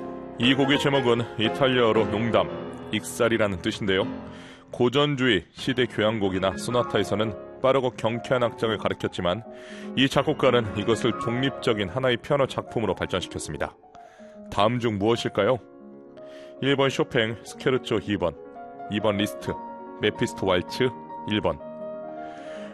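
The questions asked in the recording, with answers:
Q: 다음 중 무엇일까요?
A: 1번: 쇼팽, 스케르초 2번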